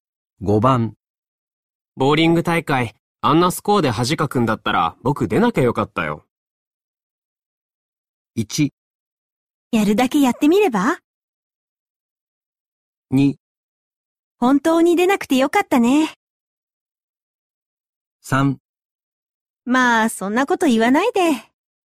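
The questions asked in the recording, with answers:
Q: ボーリング大会、あんなスコアで恥かくんだったら僕出なきゃよかったよ。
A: 3: まあそんなこと言わないで。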